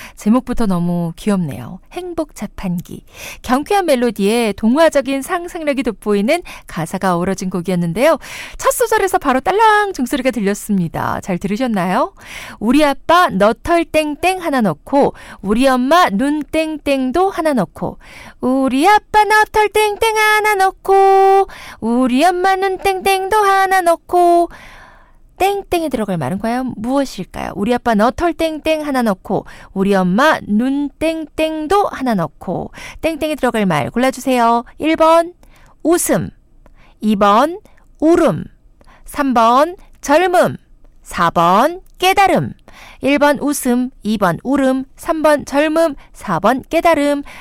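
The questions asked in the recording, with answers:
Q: 우리 아빠 너털 땡땡 하나 넣고 우리 엄마 눈 땡땡도 하나 넣고 땡땡에 들어갈 말 골라주세요.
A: 1: 웃음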